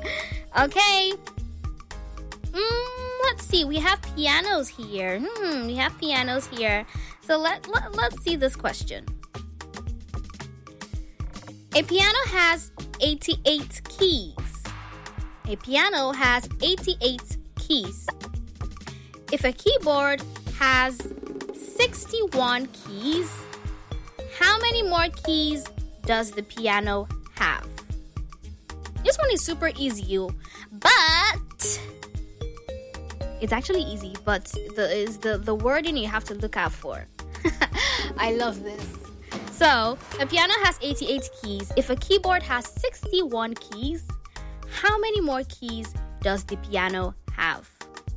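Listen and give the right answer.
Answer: 27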